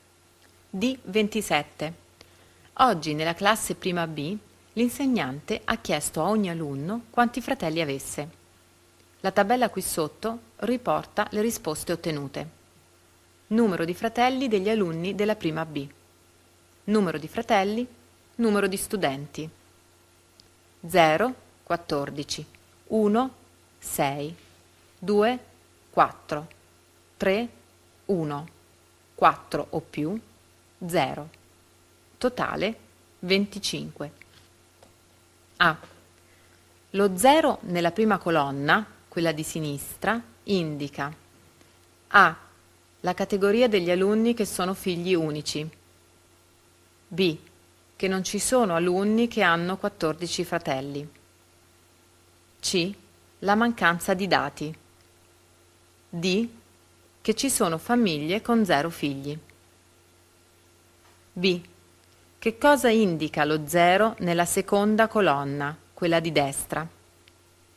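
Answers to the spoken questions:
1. A: la categoria degli alunni che sono figli unici
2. Che nessun alunno ha 4 o più fratelli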